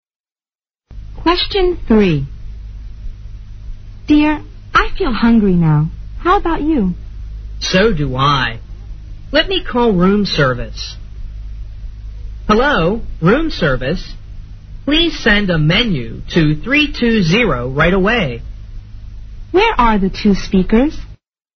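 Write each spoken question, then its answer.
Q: Where are the two speakers?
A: In a hotel room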